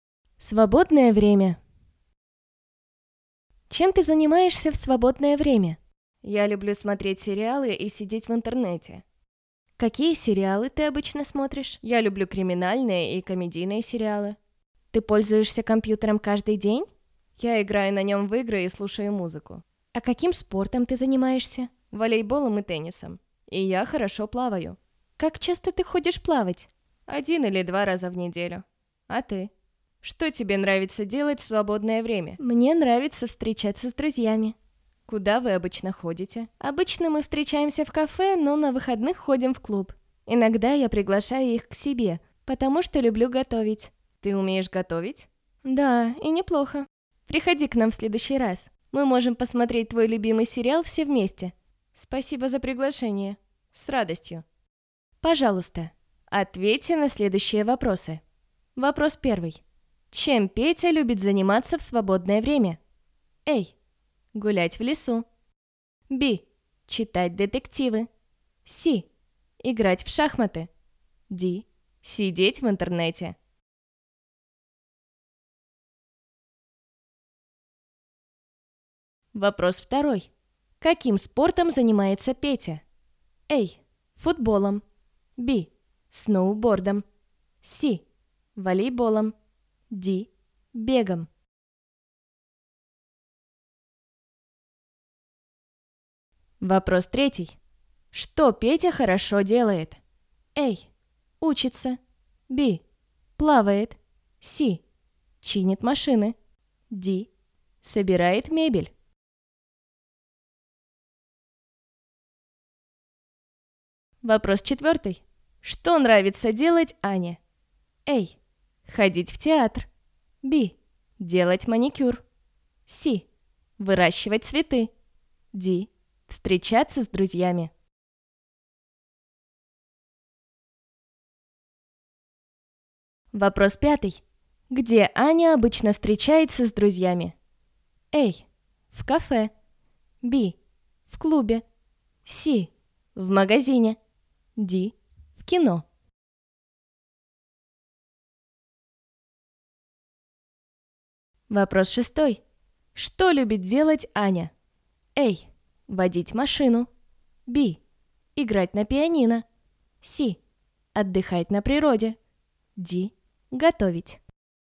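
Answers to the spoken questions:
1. D: Сидеть в интернете.
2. C: Волейболом.
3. B: Плавает.
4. D: Встречаться с друзьями.
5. A: В кафе.
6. D: Готовить.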